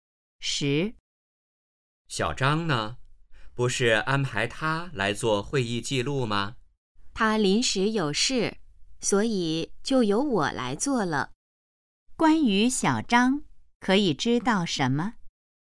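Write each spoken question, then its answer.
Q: 关于小张,可以知道什么?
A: 他临时有事,没来做会议记录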